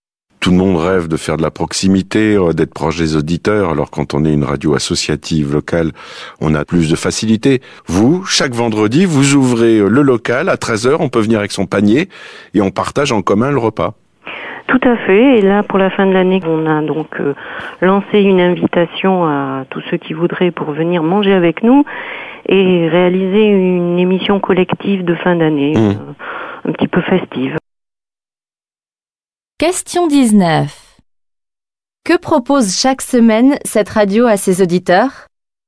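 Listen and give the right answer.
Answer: Un repas partagé en commun dans son local chaque vendredi à 13h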